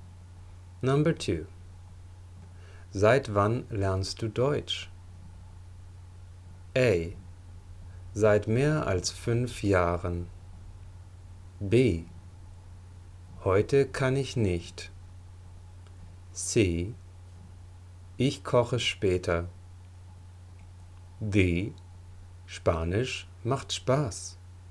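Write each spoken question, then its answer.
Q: Seit wann lernst du Deutsch?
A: A: Seit mehr als 5 Jahren.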